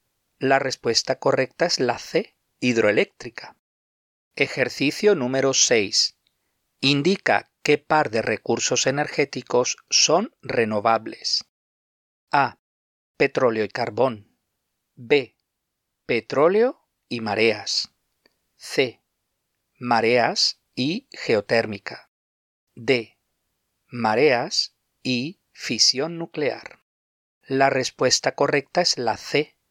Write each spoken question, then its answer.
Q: Indica qué par de recursos energéticos son renovables.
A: La respuesta correcta es la C.